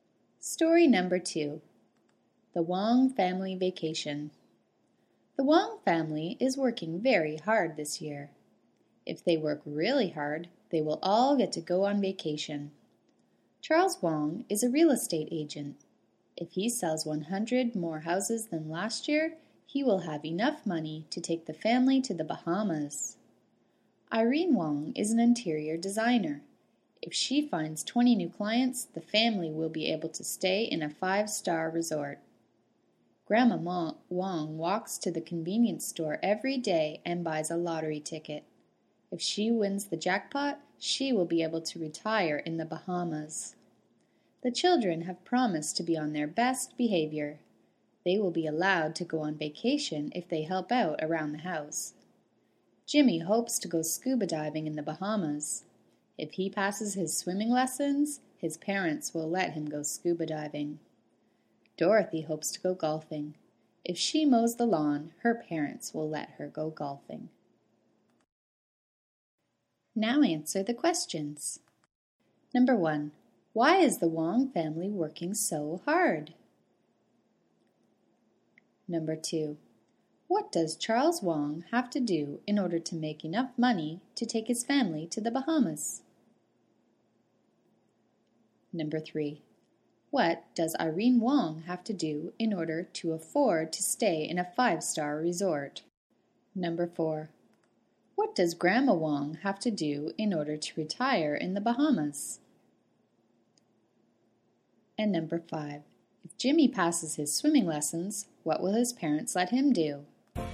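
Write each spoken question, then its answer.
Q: why is the Wong family working so hard?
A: So they can all go on vacation

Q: what does Charles Wong have to do in order to make enough money to take his family to the Bahamas?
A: Sell 100 more houses than last year

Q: what does Irene Wong have to do in order to afford to stay in a 5-star resort?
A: Find 20 new clients

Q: what does Grandma Wong have to do in order to retire in the Bahamas?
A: Win the lottery jackpot

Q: if Jimmy passes his swimming lessons, what will his parents let him do?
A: Go scuba diving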